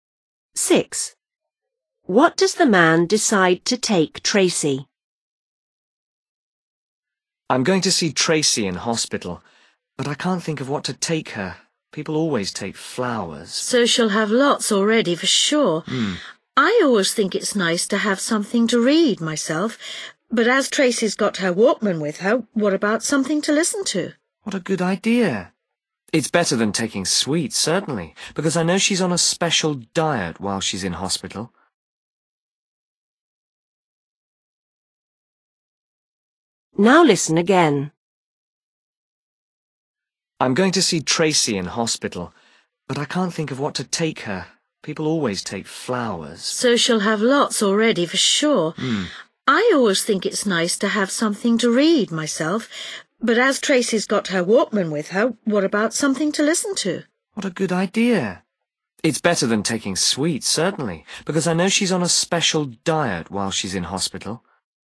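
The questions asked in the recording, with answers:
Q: What does the man decide to take Tracy?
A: something to listen to (a tape/cassette)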